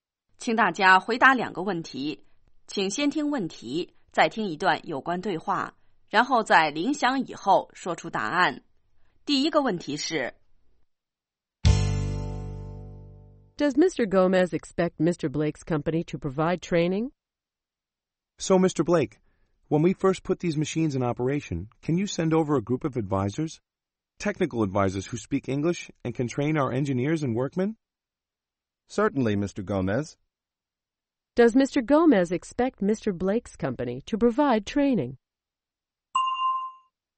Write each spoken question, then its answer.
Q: Does Mr. Gomez expect Mr. Blake's company to provide training?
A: Yes, he does.He expects the company to send a group of technical advisors to provide training.